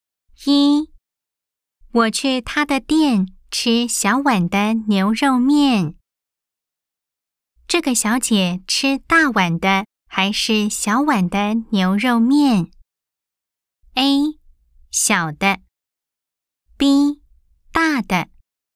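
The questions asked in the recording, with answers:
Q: 这个小姐吃大碗的还是小碗的牛肉面?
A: A: 小的。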